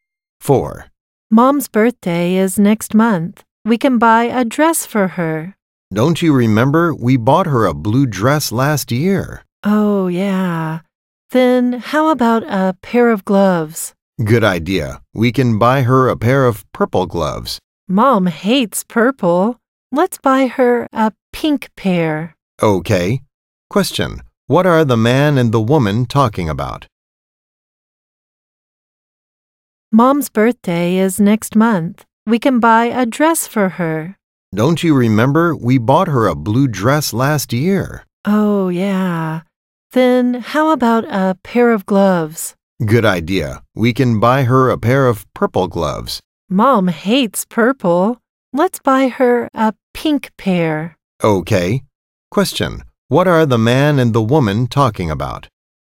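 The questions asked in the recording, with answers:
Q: What are the man and the woman talking about?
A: A birthday present for their mom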